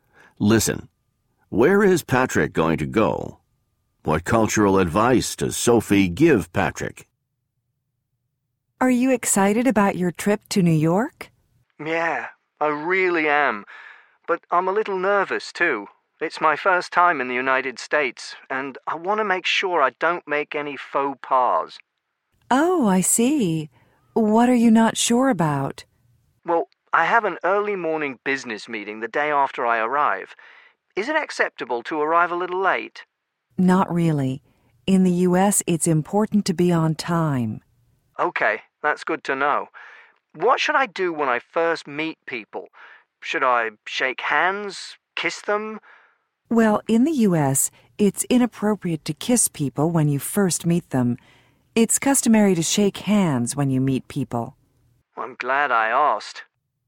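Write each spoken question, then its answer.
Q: Where is Patrick going to go?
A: New York, in the United States

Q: What cultural advice does Sophie give Patrick?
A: Be on time, and shake hands instead of kissing when you first meet people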